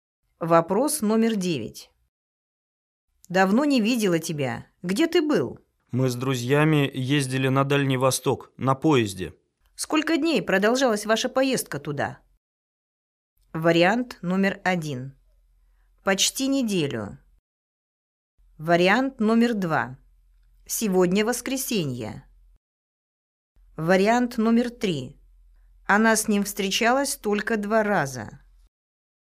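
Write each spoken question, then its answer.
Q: Сколько дней продолжалась ваша поездка туда?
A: 1: Почти неделю.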